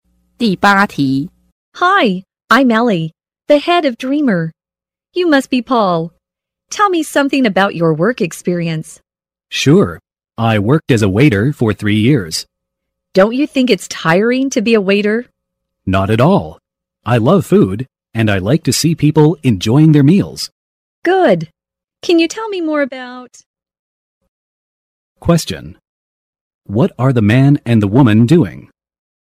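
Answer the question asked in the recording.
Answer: Having a job interview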